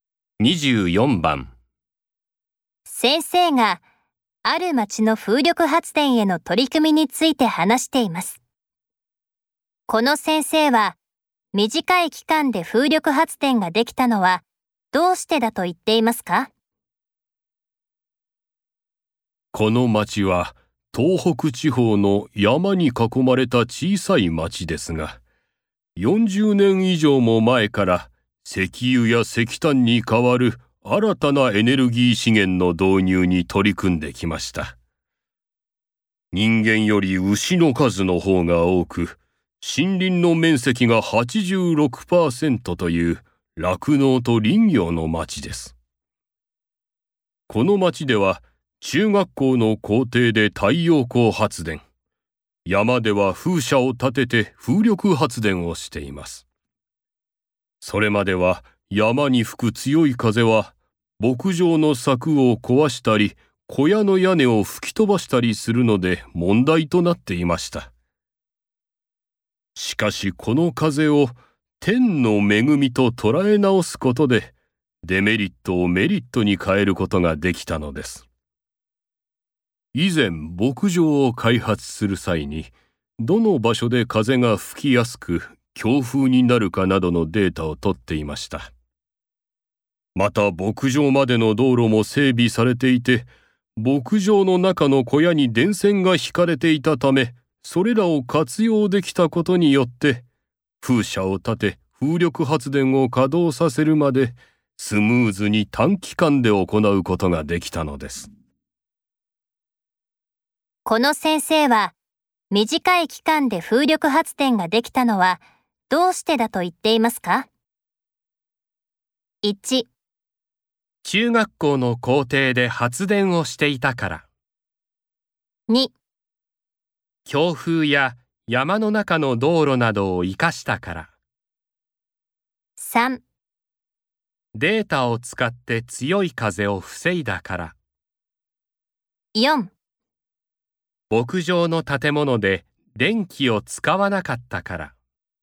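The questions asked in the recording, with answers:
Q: この先生は短い期間で風力発電ができたのはどうしてだと言っていますか?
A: 2: 強風や山の中の道路などを生かしたから。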